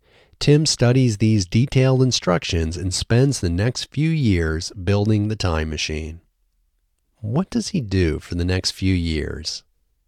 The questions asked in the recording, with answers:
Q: What does he do for the next few years?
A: He spends the next few years building the time machine.